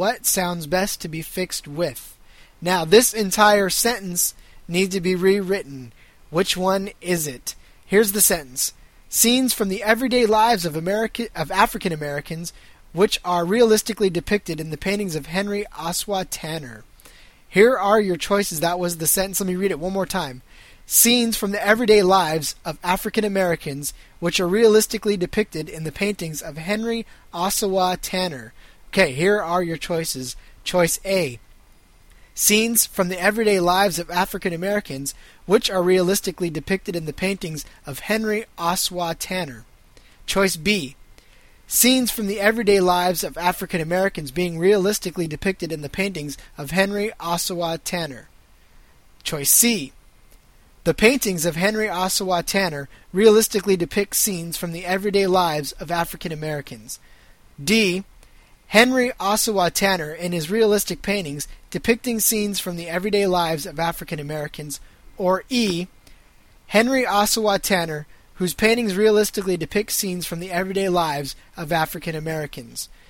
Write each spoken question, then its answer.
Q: Which one is it?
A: If you selected the answer C, which is the paintings of Henry Osawa Tanner realistically depict scenes from the everyday lives of African Americans, you, once again, were absolutely correct.